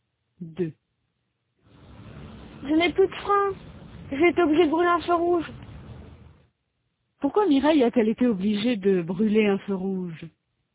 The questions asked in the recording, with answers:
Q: Pourquoi Mireille a-t-elle été obligée de brûler un feu rouge?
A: Parce qu'elle n'avait plus de frein.